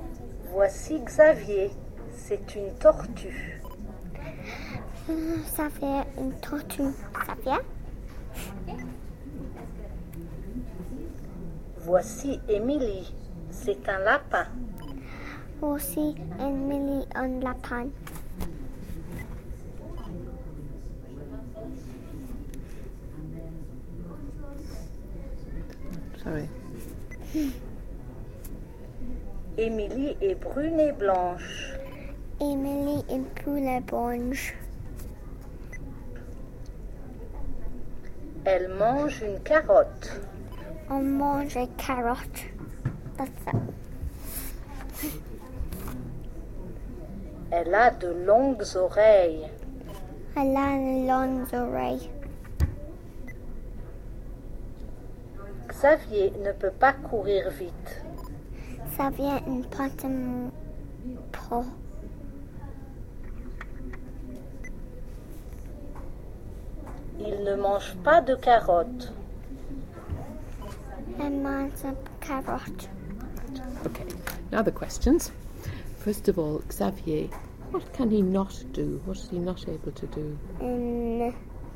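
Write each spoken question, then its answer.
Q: First of all, Xavier, what can he not do?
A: He can't run fast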